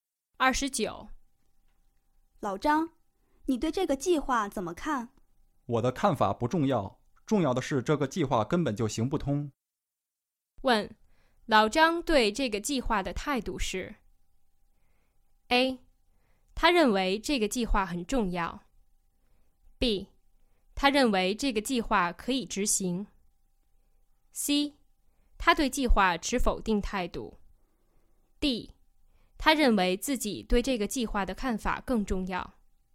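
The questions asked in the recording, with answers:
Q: 问,老张对这个计划的态度是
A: C: 他对计划持否定态度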